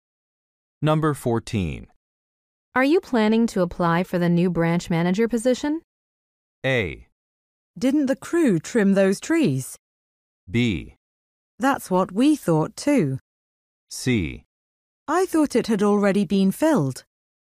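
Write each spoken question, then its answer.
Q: Are you planning to apply for the new branch manager position?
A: C: I thought it had already been filled.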